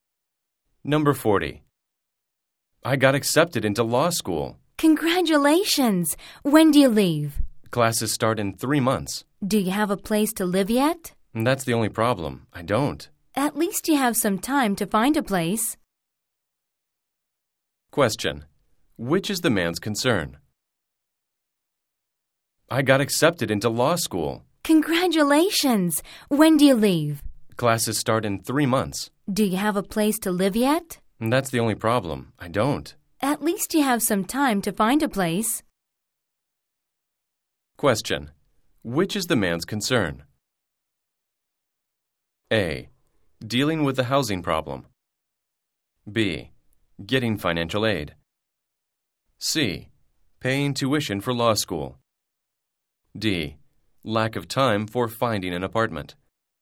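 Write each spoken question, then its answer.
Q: Which is the man's concern?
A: A: Dealing with the housing problem.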